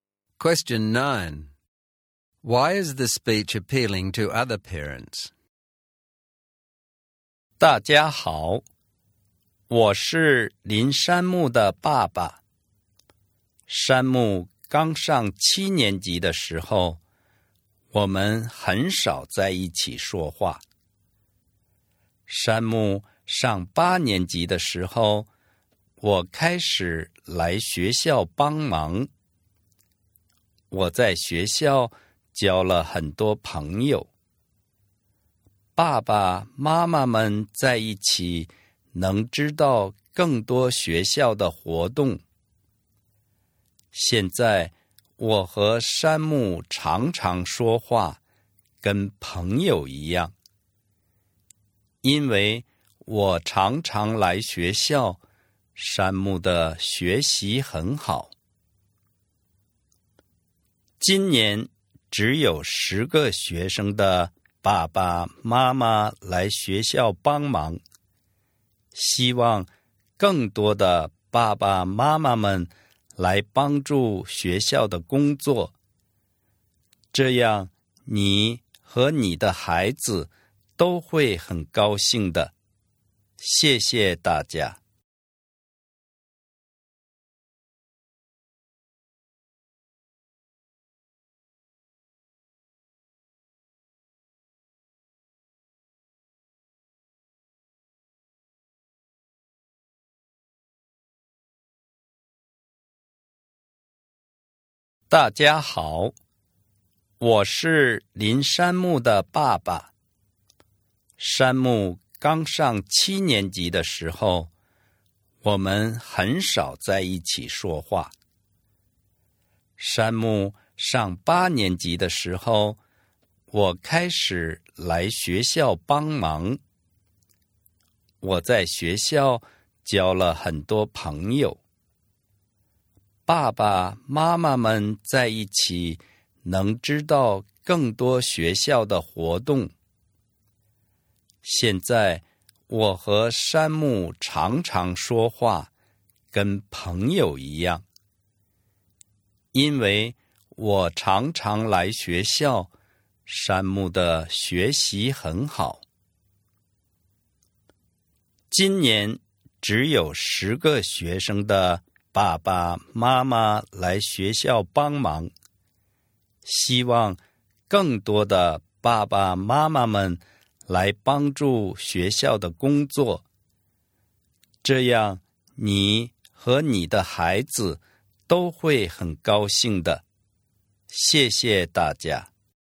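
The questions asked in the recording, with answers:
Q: Why is the speech appealing to other parents?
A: Helping at school let him make friends and learn more about school activities, and improved his relationship with his son and his son's studies. Parents and children will both be happy.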